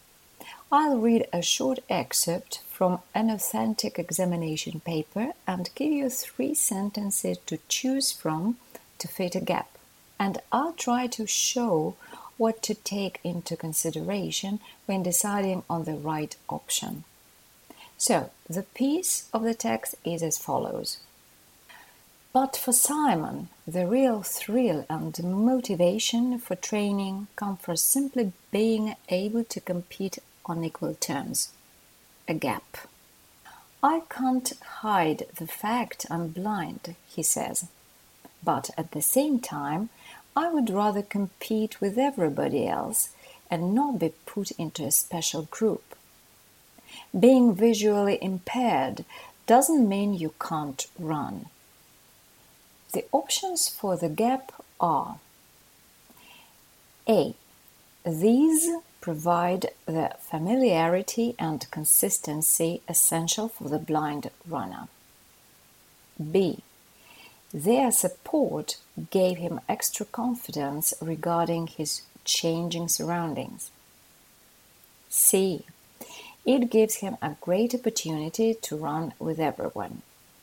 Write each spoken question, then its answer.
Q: The options for the gap are A.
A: So, the correct sentence fitting best the gap in the gap is C.